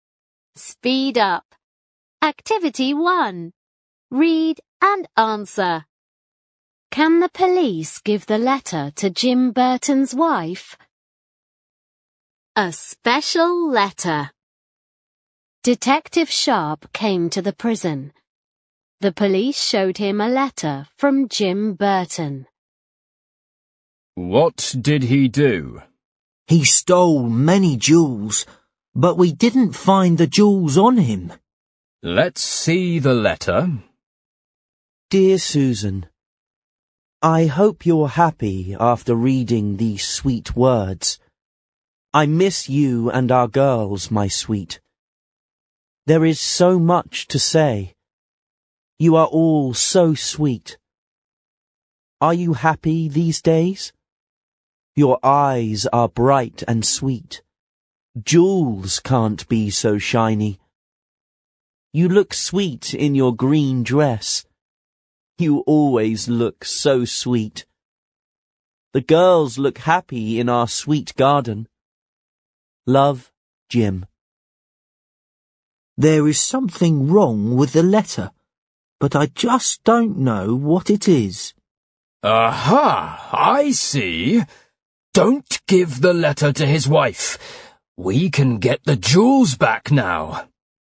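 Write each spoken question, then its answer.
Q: Can the police give the letter to Jim Burton's wife?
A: No, they can't.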